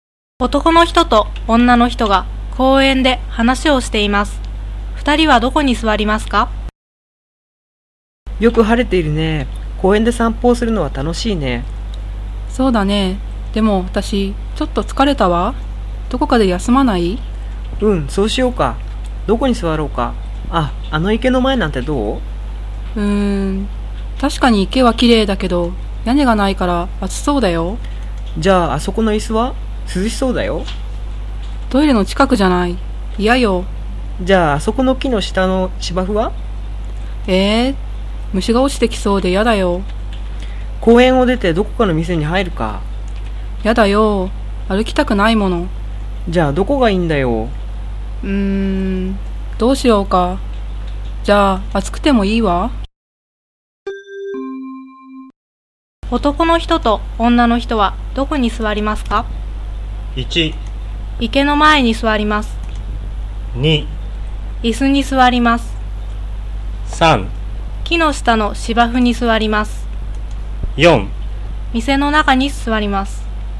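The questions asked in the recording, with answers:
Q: 男の人と女の人はどこに座りますか?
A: 1: 池の前に座ります。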